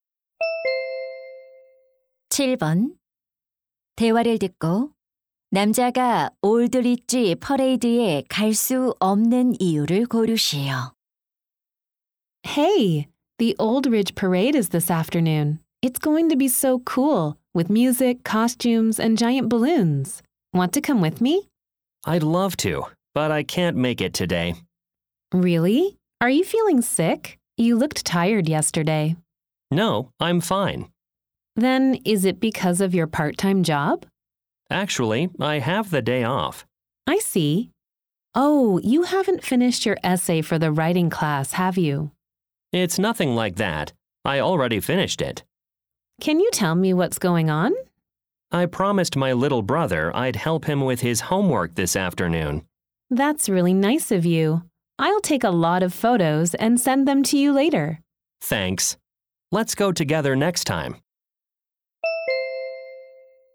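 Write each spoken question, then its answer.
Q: 대화를 듣고 남자가 올드리지 퍼레이드에 갈 수 없는 이유를 고르시오.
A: 남동생의 숙제를 도와주기로 약속해서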